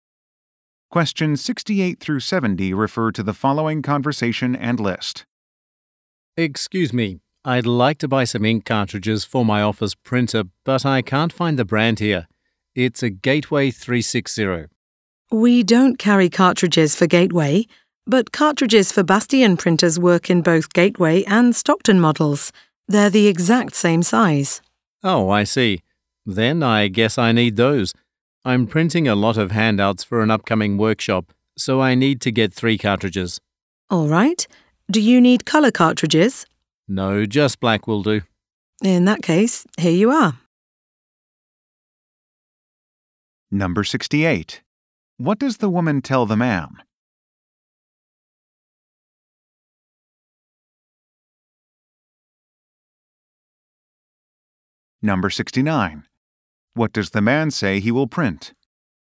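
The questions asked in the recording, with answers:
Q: What does the woman tell the man?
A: Bastian cartridges work in Gateway printers

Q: What does the man say he will print?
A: Handouts for a workshop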